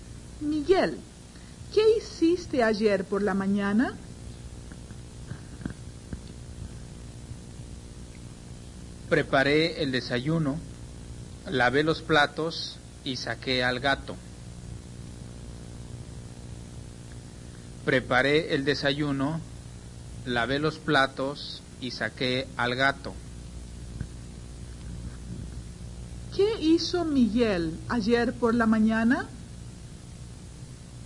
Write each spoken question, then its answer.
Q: ¿Qué hizo Miguel ayer por la mañana?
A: Miguel preparó el desayuno, lavó los platos y sacó al gato.